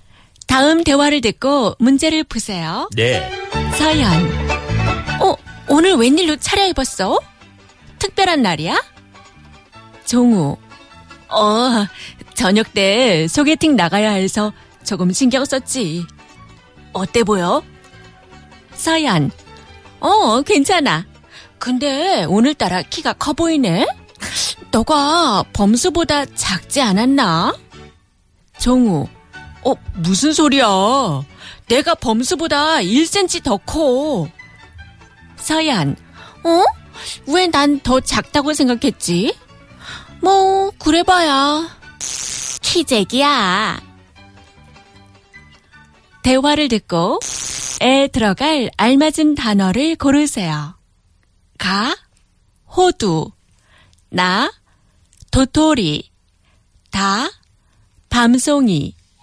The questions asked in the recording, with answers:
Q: 대화를 듣고 에 들어갈 알맞은 단어를 고르세요.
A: Na. 도토리 키재기.